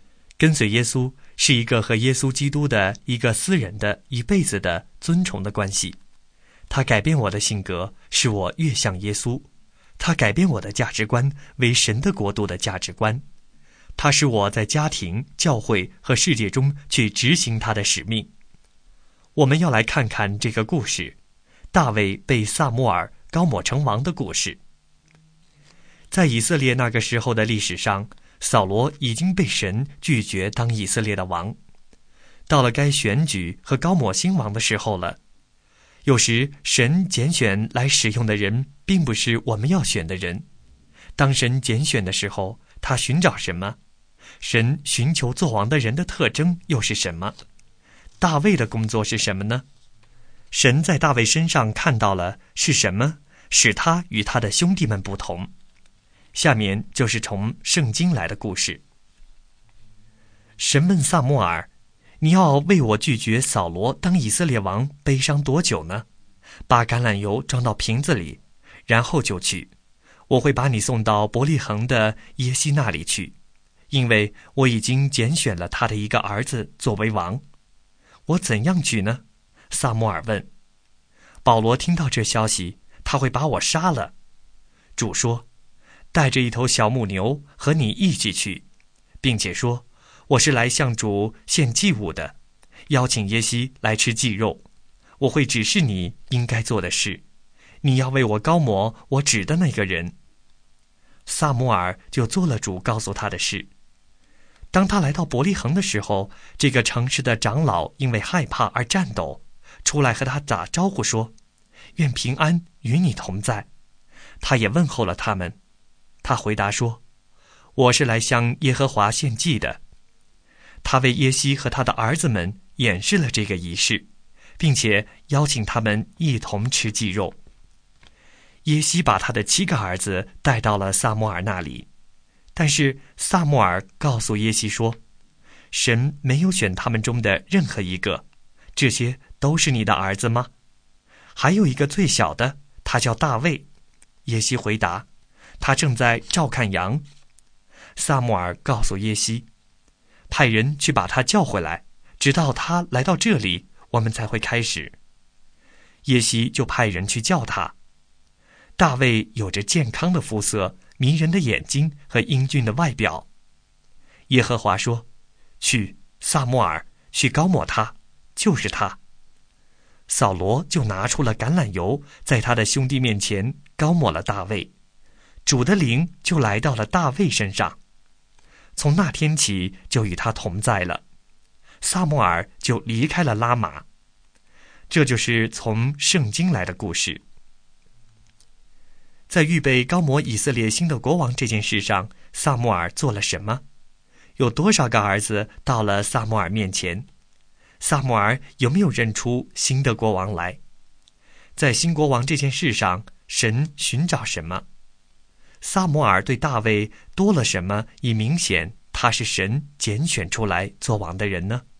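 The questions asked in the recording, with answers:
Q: 有多少个儿子到了撒母耳面前?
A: 七个(后来大卫也来了)

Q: 撒母耳对大卫多了什么,以明显他是神拣选出来做王的人呢?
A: 在他兄弟面前用橄榄油膏抹了他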